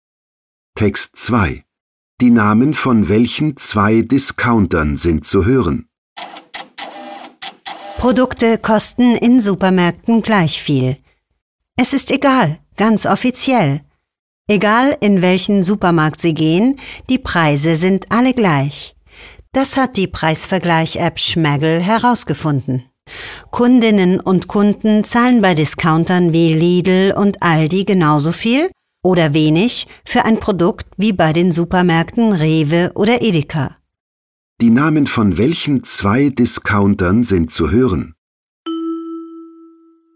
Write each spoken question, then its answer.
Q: Die Namen von welchen zwei Discountern sind zu hören?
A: Hier sind die Namen der beiden Discounter Lidl und Aldi zu hören.